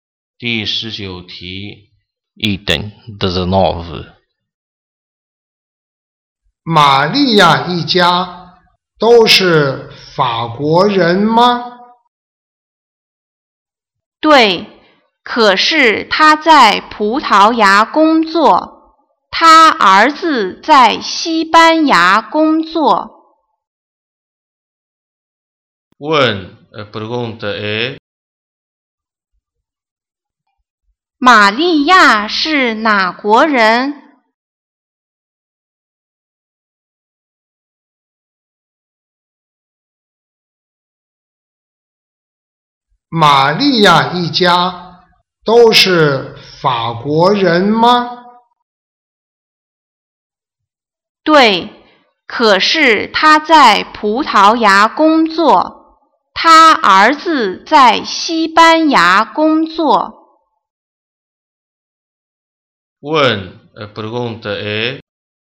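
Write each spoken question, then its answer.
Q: 玛利亚是哪国人?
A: 法国人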